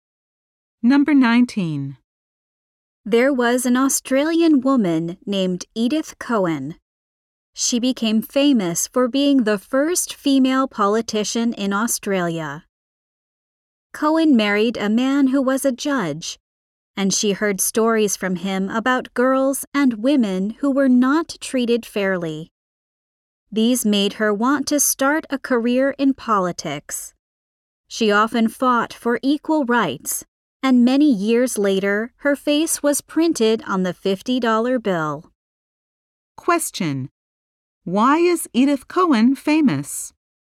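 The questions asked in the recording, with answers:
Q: why is Edith Cowan famous?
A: She was the first female politician in Australia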